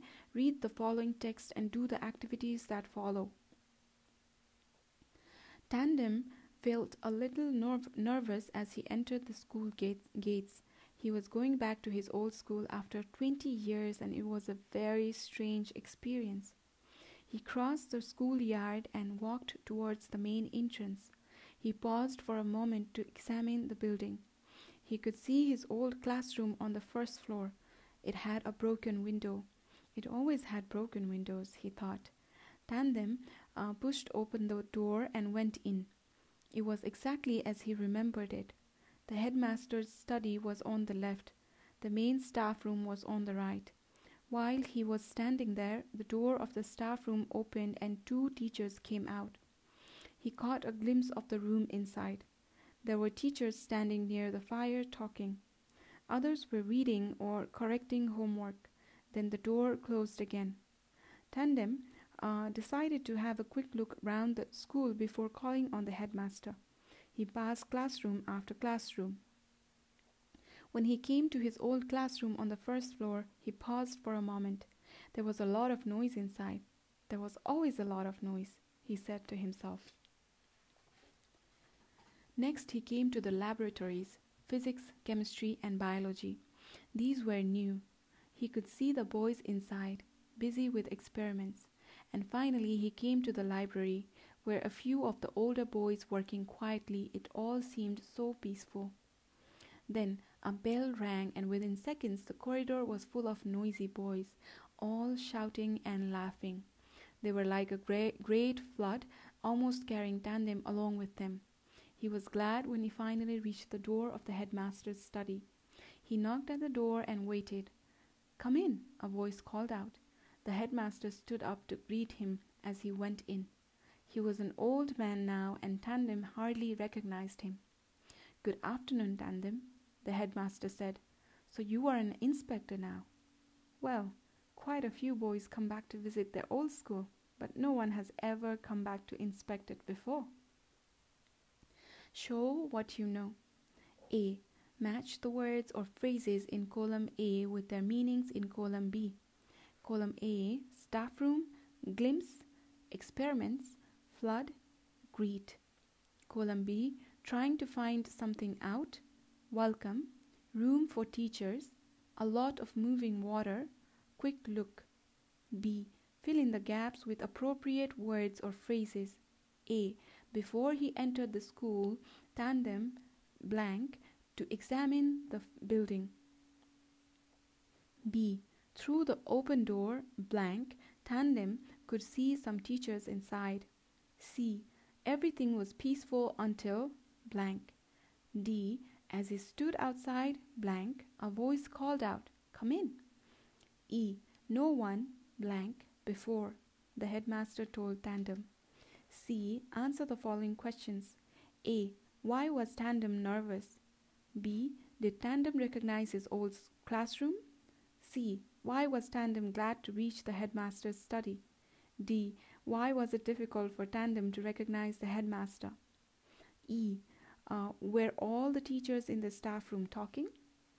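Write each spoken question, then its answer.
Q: Why was Tandem nervous?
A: He was going back to his old school after 20 years

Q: Did Tandem recognize his old classroom?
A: Yes

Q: Why was Tandem glad to reach the headmaster's study?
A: The corridor was full of noisy boys almost carrying him along

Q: Why was it difficult for Tandem to recognize the headmaster?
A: He was an old man now

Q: Uh, were all the teachers in the staff room talking?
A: No, others were reading or correcting homework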